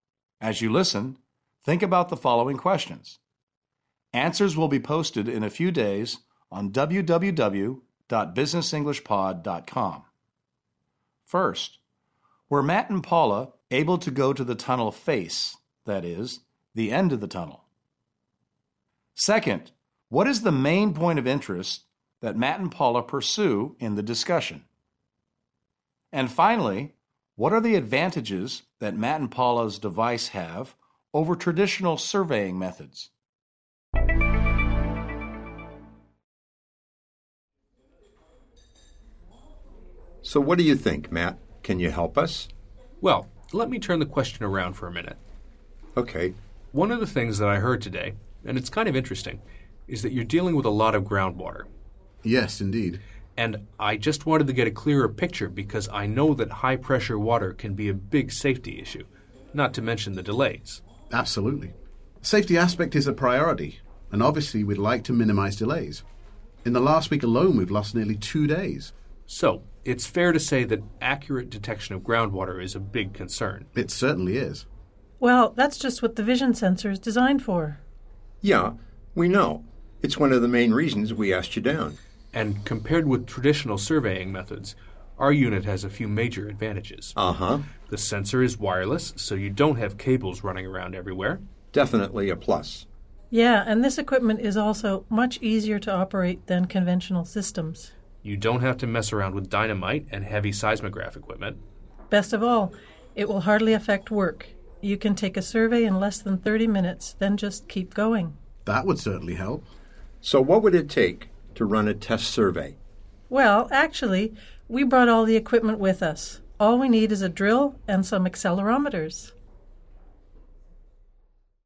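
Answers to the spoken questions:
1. Groundwater: accurate detection of high-pressure groundwater, a safety and delay concern
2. It is wireless, easier to operate (no dynamite or heavy seismograph equipment), and hardly affects work (a survey takes under 30 minutes)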